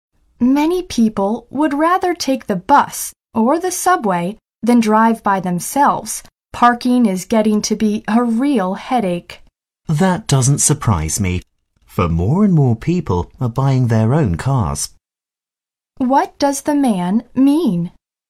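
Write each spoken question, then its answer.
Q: What does the man mean?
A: He is not surprised, because more and more people are buying cars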